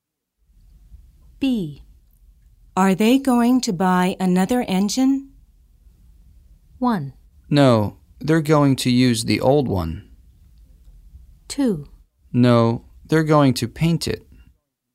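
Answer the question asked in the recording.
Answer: 1: No, they're going to use the old one.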